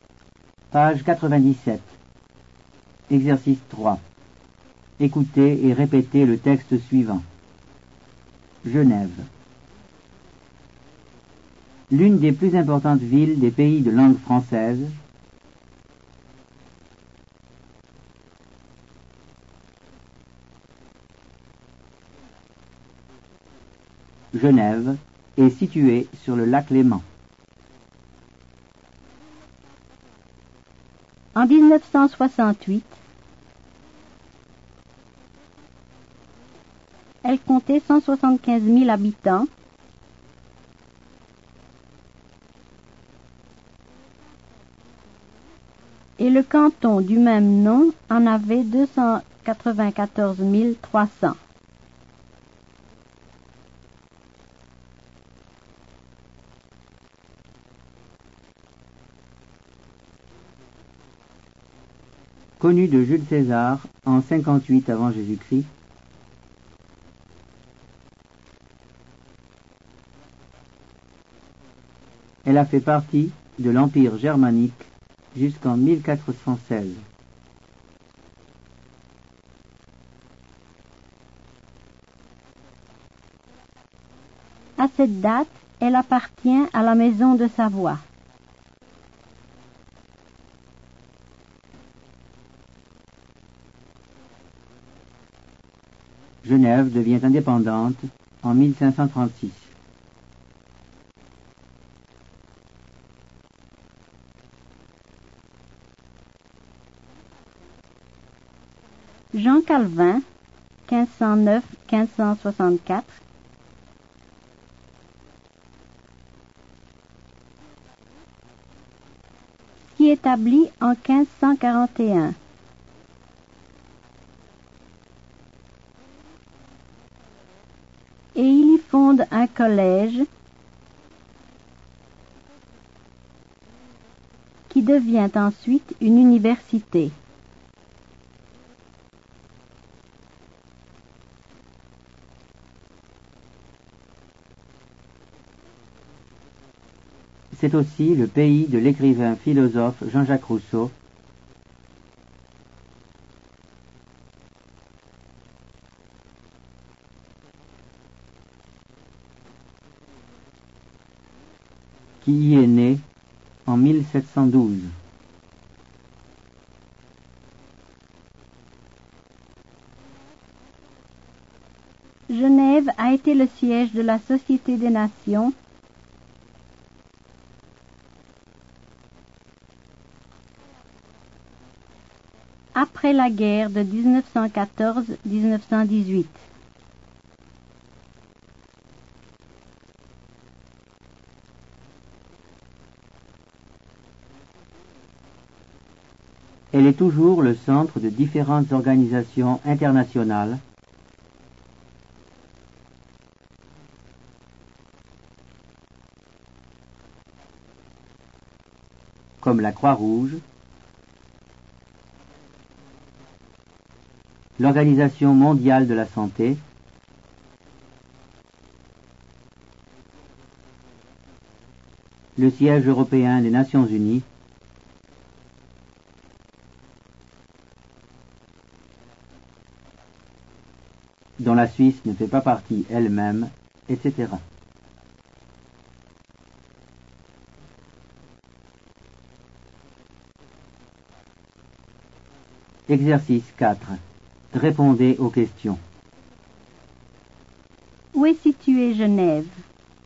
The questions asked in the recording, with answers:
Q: Où est située Genève?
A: Genève est située en Suisse.